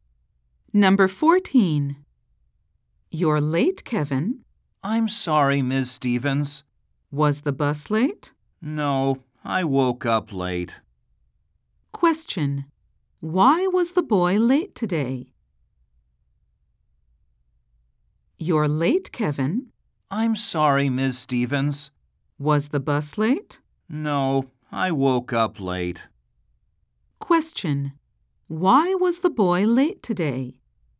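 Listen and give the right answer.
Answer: He woke up late.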